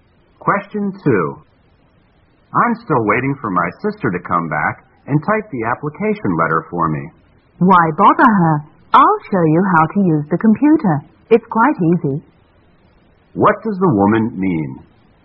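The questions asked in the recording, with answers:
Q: What does the woman mean?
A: She will show him how to use the computer to type the letter himself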